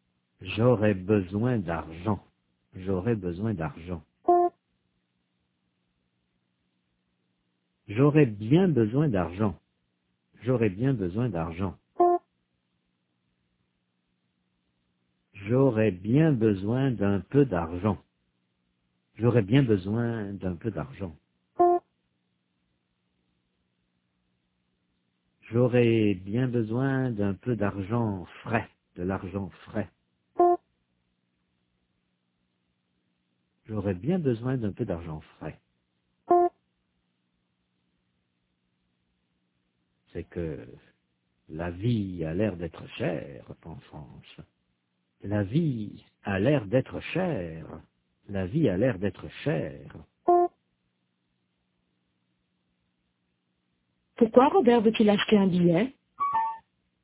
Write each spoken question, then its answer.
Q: Pourquoi Robert veut-il acheter un billet?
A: Parce qu'il a bien besoin d'un peu d'argent frais.